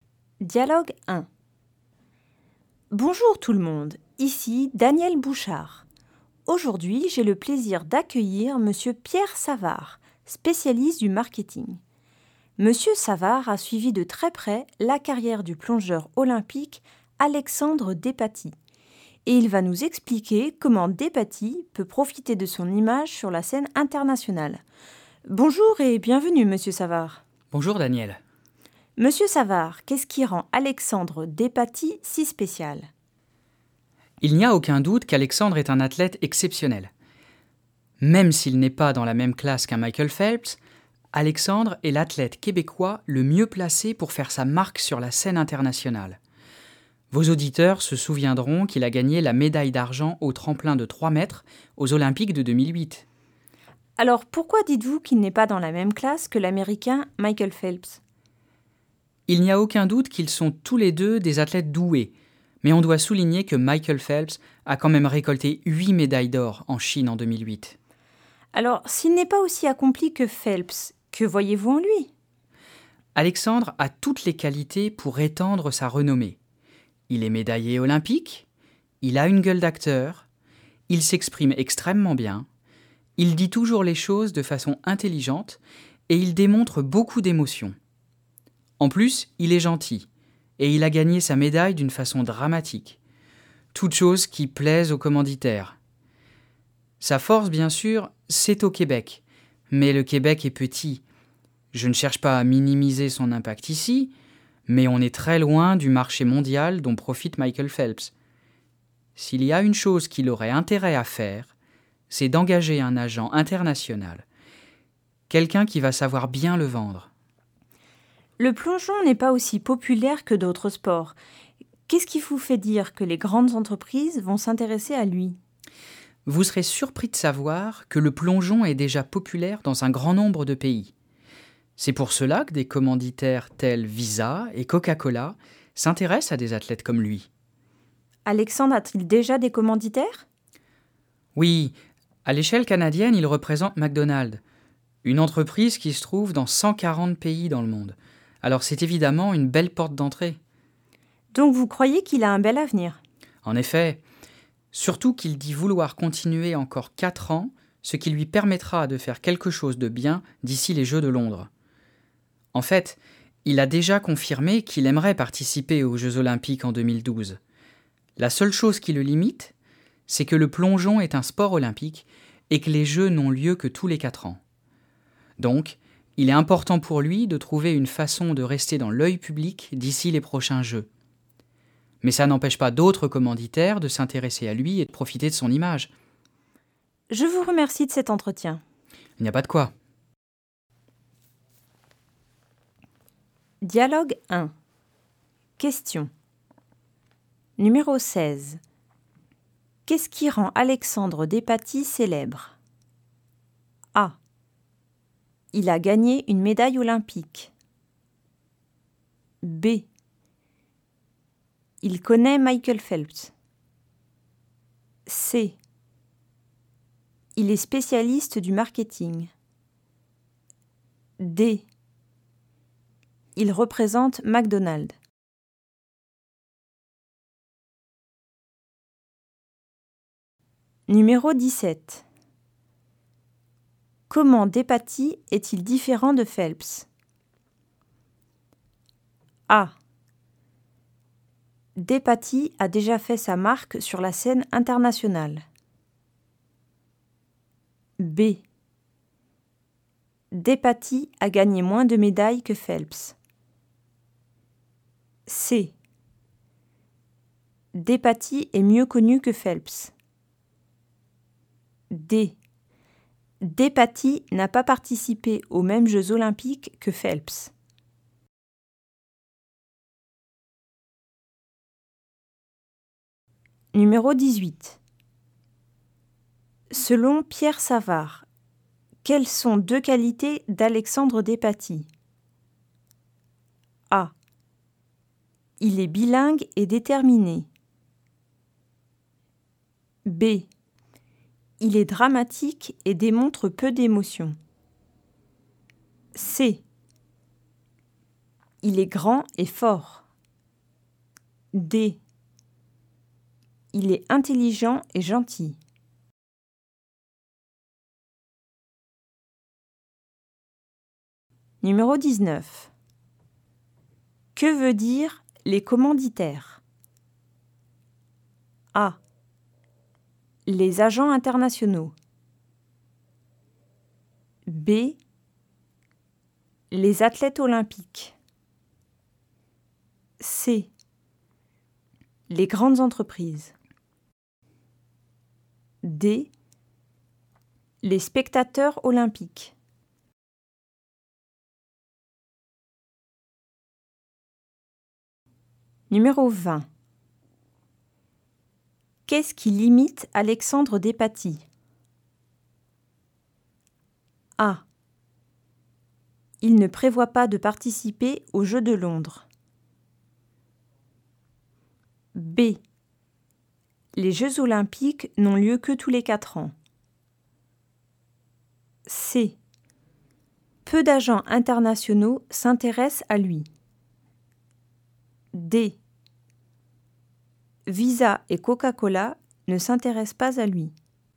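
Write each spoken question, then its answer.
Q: Qu'est-ce qui rend Alexandre Despaty célèbre?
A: A: Il a gagné une médaille olympique.

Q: Comment Despaty est-il différent de Phelps?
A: B: Despaty a gagné moins de médailles que Phelps.

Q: Selon Pierre Savard, quelles sont deux qualités d'Alexandre Despaty?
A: D: Il est intelligent et gentil.

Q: Que veut dire les commanditaires?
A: C: Les grandes entreprises.

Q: Qu'est-ce qui limite Alexandre Despaty?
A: B: Les Jeux olympiques n'ont lieu que tous les 4 ans.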